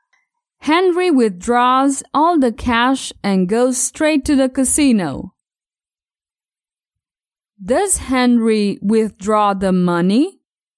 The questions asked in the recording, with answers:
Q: Does Henry withdraw the money?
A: Yes, Henry withdraws all the cash.